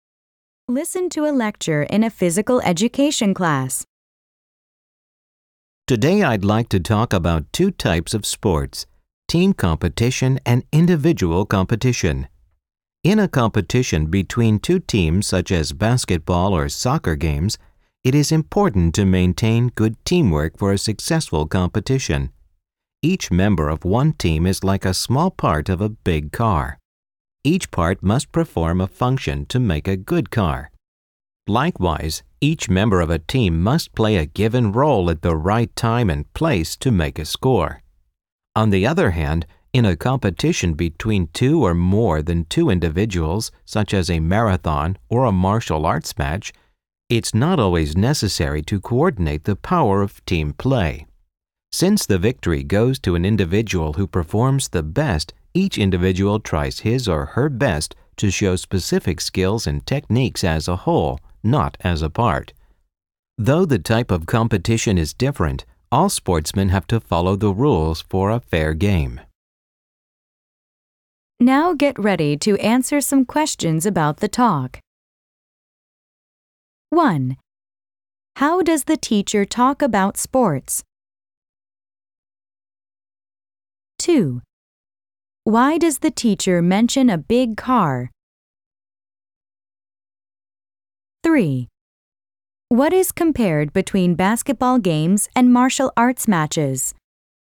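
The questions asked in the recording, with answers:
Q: How does the teacher talk about sports?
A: By comparing two types of sports: team competition and individual competition

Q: Why does the teacher mention a big car?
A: To compare team members to parts that each must play a role

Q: What is compared between basketball games and martial arts matches?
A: Teamwork versus individual skills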